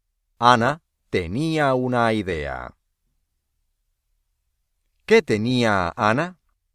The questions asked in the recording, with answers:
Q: ¿Qué tenía Ana?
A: Una idea.